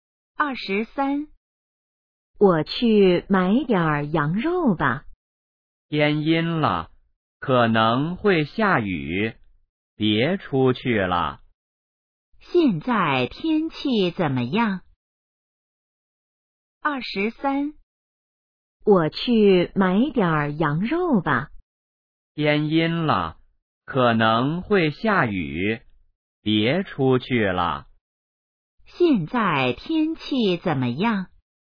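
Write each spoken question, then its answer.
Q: 现在天气怎么样?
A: 天阴了,可能会下雨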